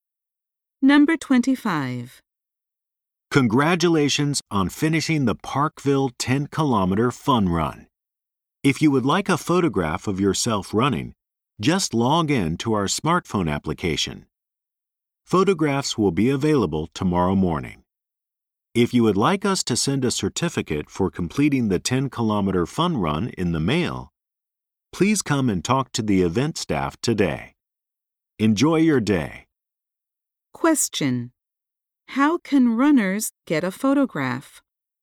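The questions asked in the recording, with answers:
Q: How can runners get a photograph?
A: By logging in to the smartphone application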